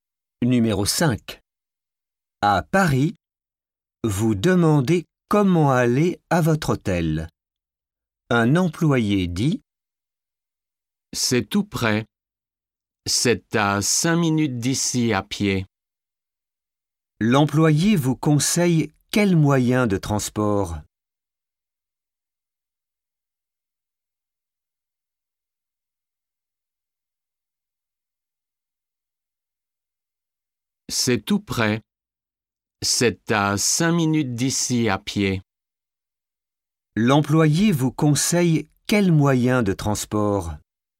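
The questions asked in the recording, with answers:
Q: L'employé vous conseille quel moyen de transport ?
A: À pied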